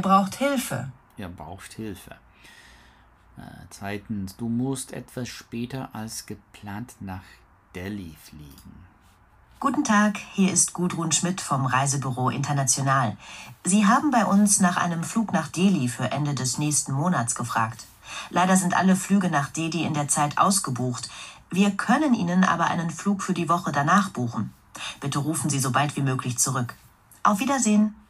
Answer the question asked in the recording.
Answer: Ja, richtig.